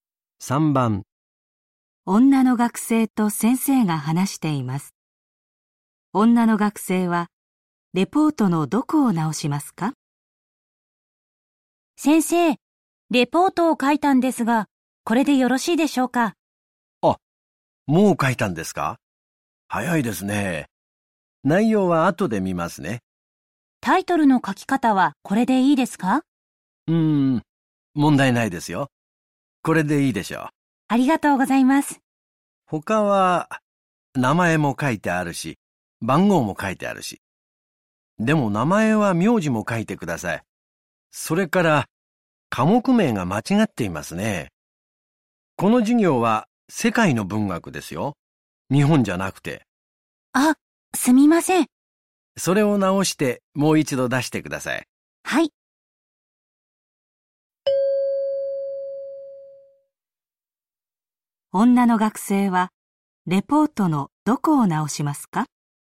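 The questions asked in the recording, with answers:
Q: 女の学生はレポートのどこを直しますか?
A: 名前(名字も書く)と科目名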